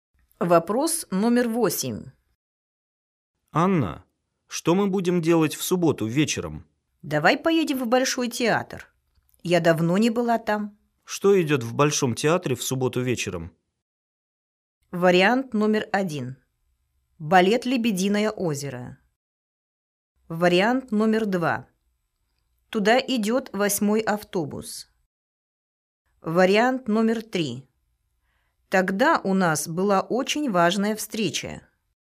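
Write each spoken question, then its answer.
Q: Что идет в Большом театре в субботу вечером?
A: 1: Балет «Лебединое озеро».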